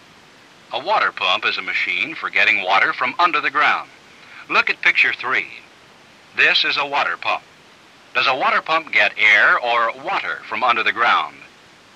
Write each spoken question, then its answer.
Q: Does a water pump get air or water from under the ground?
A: It gets water from under the ground.